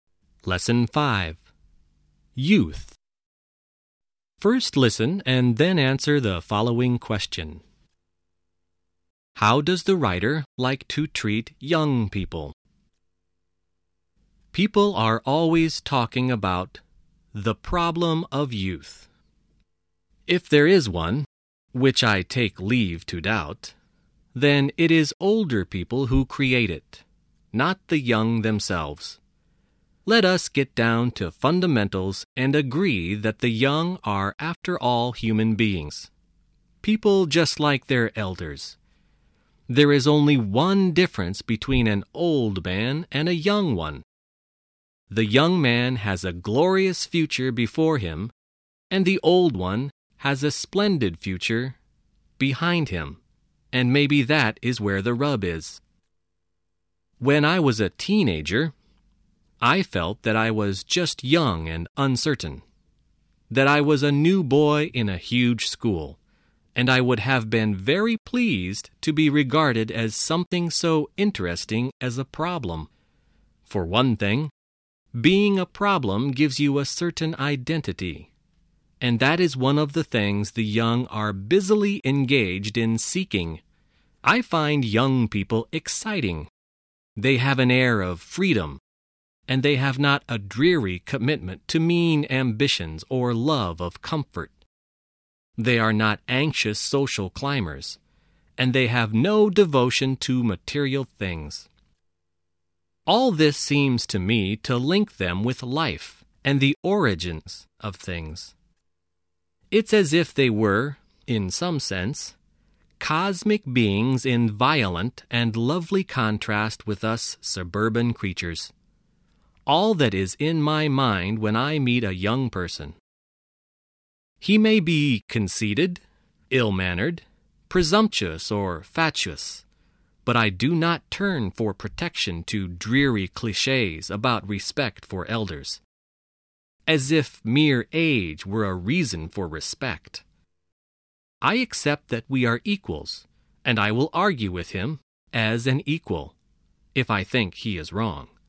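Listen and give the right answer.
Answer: As equals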